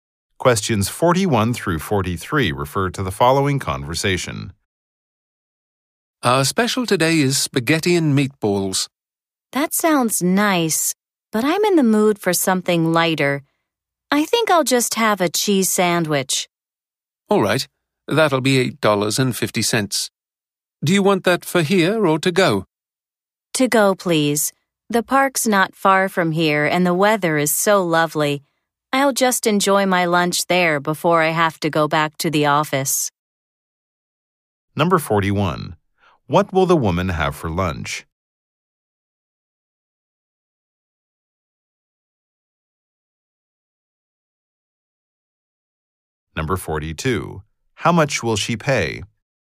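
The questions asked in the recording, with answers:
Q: woman have for lunch?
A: A cheese sandwich

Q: How much will she pay?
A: $8.50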